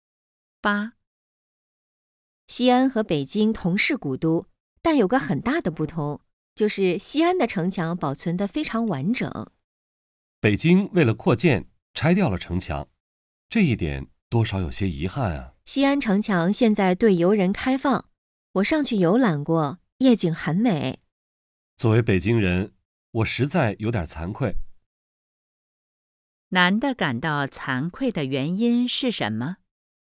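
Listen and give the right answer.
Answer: 北京为了扩建拆掉了城墙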